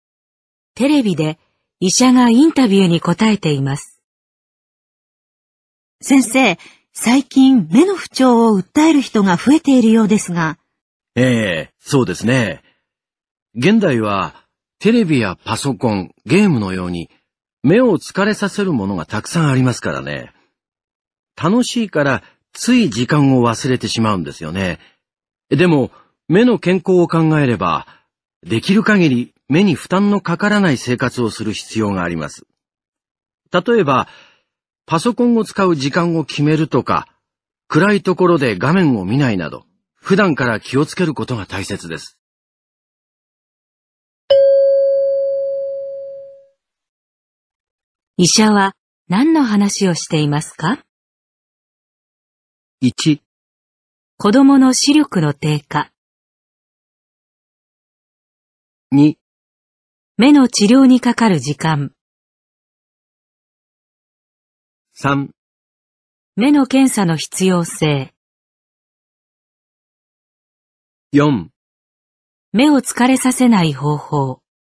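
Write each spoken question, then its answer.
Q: 医者は何の話をしていますか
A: 4: 目を疲れさせない方法。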